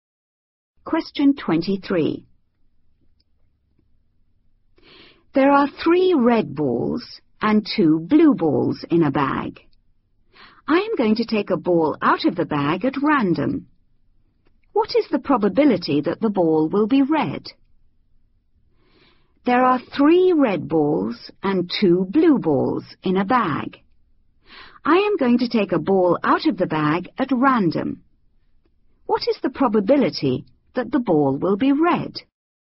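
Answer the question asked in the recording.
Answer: 3/5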